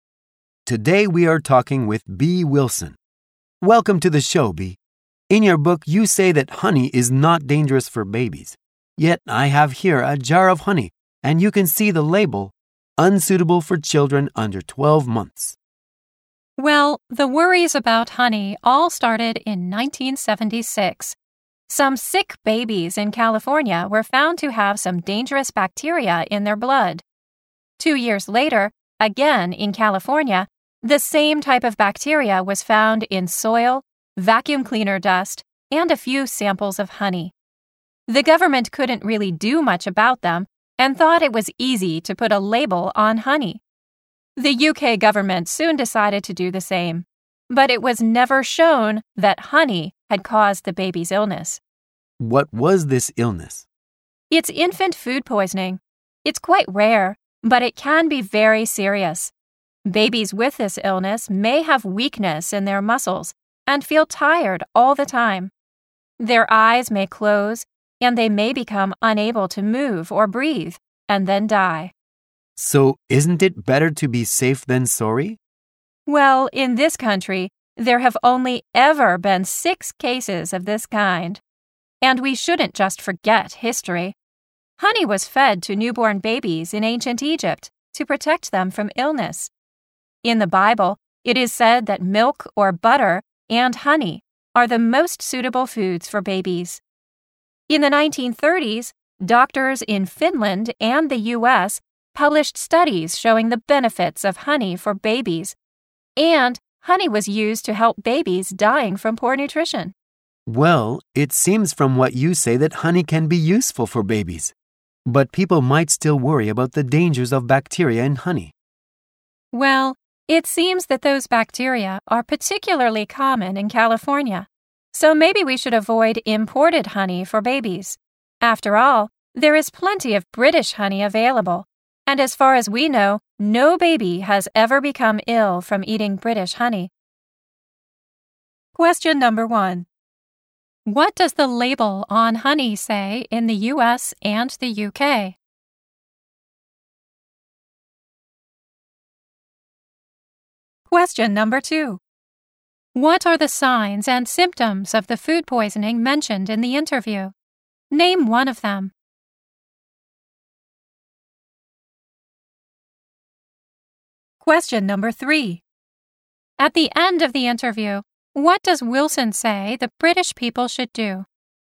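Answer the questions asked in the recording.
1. Unsuitable for children under 12 months.
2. Muscle weakness, feeling tired all the time, eyes closing, being unable to move or breathe.
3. Avoid imported honey for babies and use British honey.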